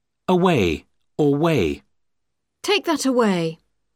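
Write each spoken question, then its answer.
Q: Away or way.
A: away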